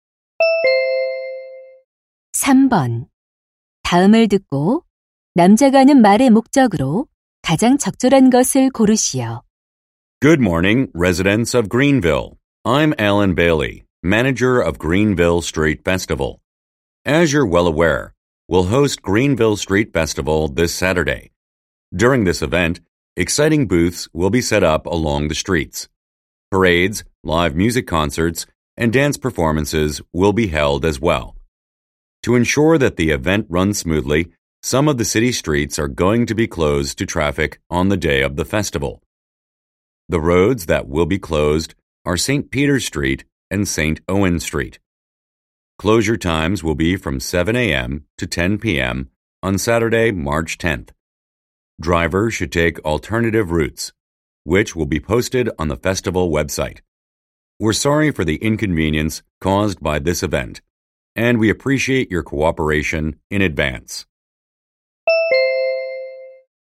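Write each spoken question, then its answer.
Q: 다음을 듣고 남자가 하는 말의 목적으로 가장 적절한 것을 고르시오.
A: 축제 당일 도로 통제를 안내하려고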